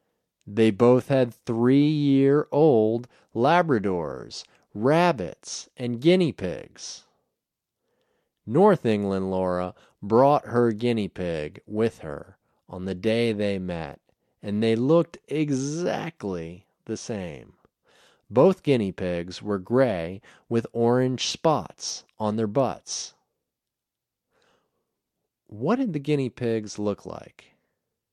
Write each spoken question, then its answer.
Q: What did the guinea pigs look like?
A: They were gray with orange spots on their butts.